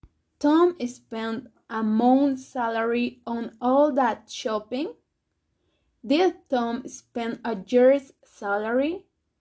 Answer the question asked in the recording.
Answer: No, not a year's salary. Tom spent a month's salary.